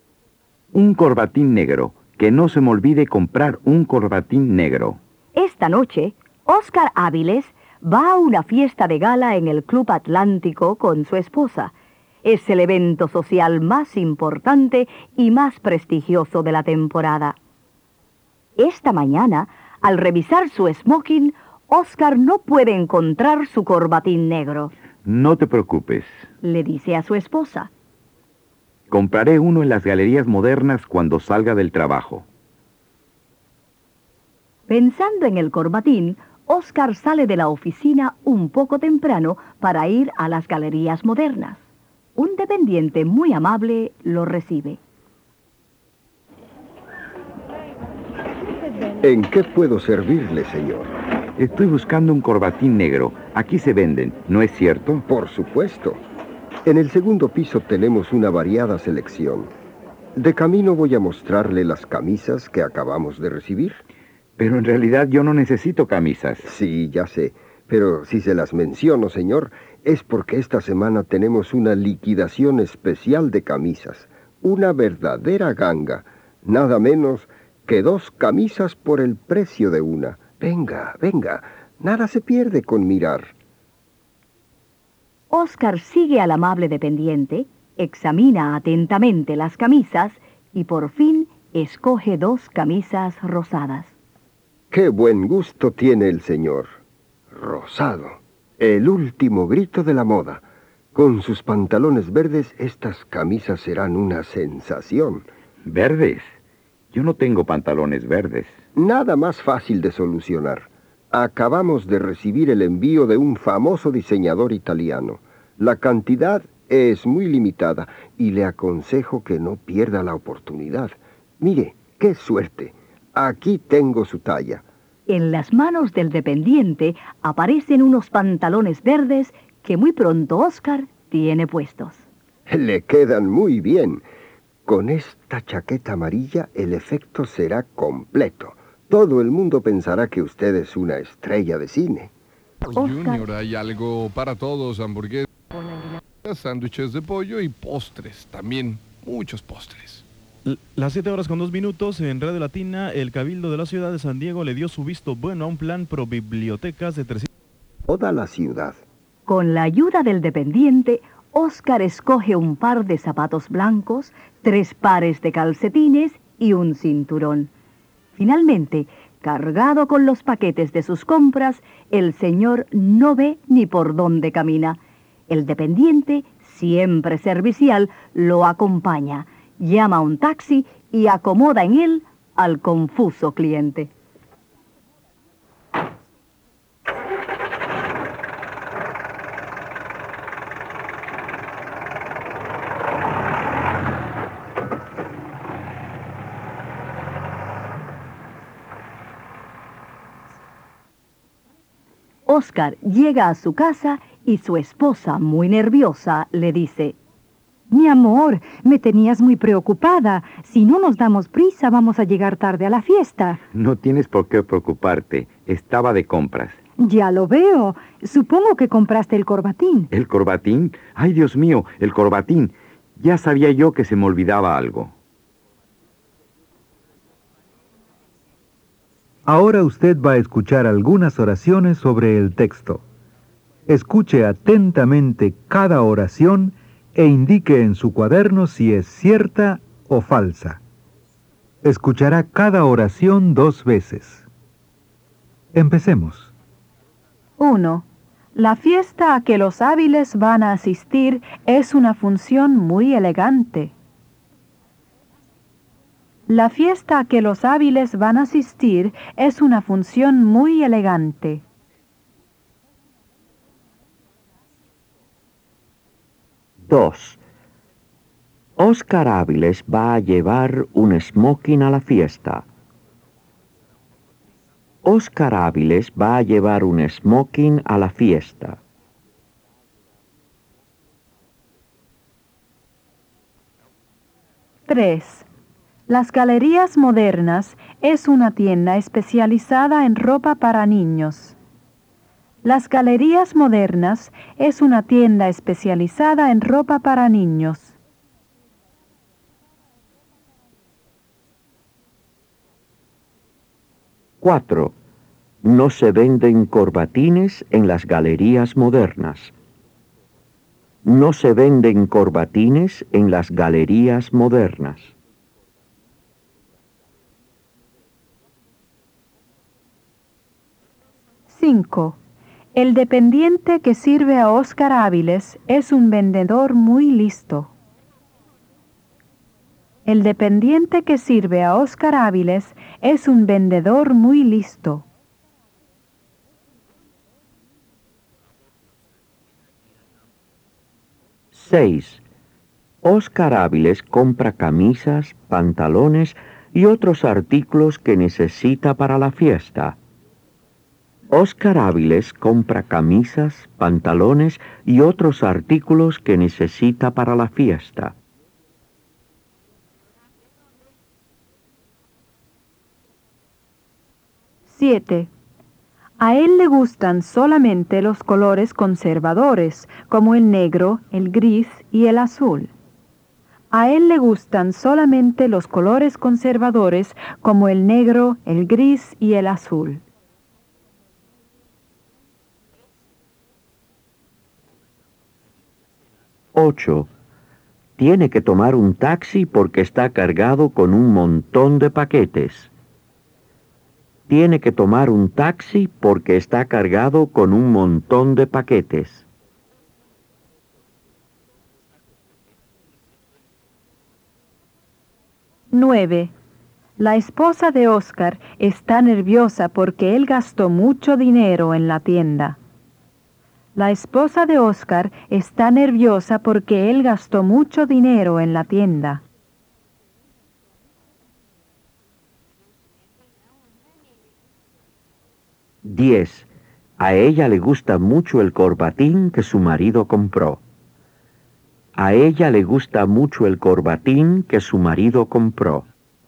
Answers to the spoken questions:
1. Números 1, 2, 5 y 8.
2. Números 1, 2, 5 y 8.
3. Números 3, 4, 6, 7, 9 y 10.
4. Números 3, 4, 6, 7, 9 y 10.
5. Números 1, 2, 5 y 8.
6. Números 3, 4, 6, 7, 9 y 10.
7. Números 3, 4, 6, 7, 9 y 10.
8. Números 1, 2, 5 y 8.
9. Números 3, 4, 6, 7, 9 y 10.
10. Números 3, 4, 6, 7, 9 y 10.